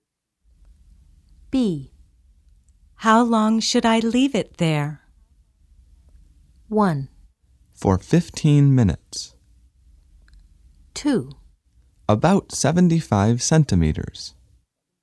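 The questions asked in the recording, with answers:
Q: How long should I leave it there?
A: 1: For 15 minutes.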